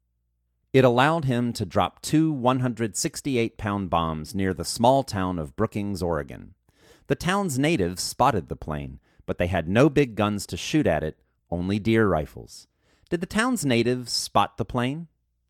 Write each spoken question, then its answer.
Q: Did the town's natives spot the plane?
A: Yes, the town's natives spotted the plane.